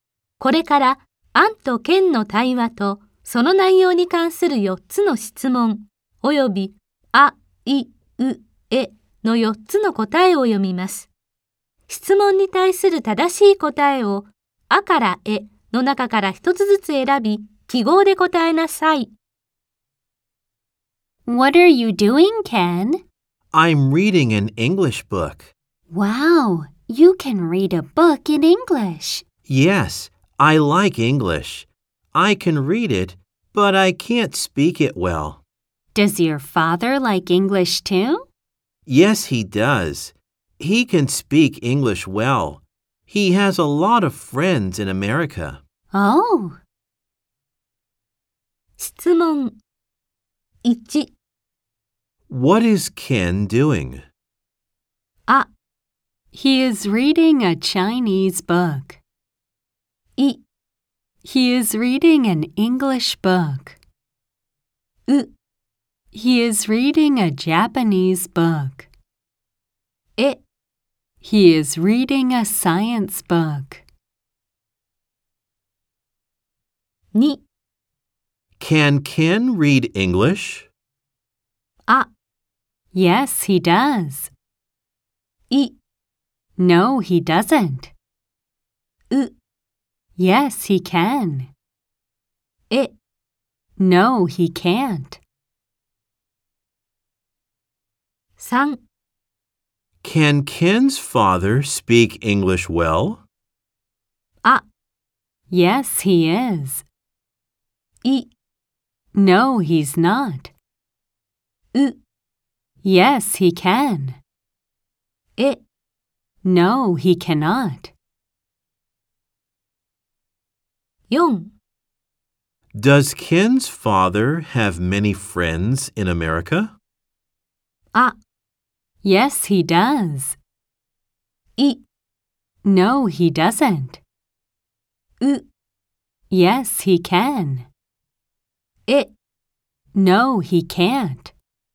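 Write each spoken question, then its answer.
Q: What is Ken doing?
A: い: He is reading an English book.

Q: Can Ken read English?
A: う: yes, he can.

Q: Can Ken's father speak English well?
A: う: Yes, he can.

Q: Does Ken's father have many friends in America?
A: あ: Yes, he does.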